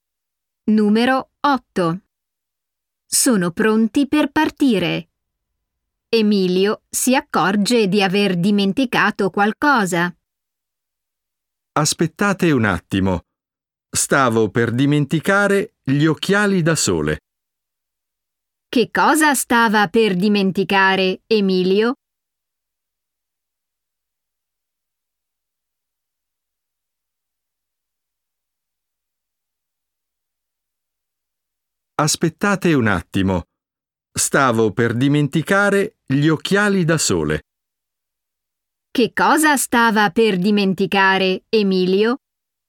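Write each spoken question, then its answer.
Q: Che cosa stava per dimenticare, Emilio?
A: Gli occhiali da sole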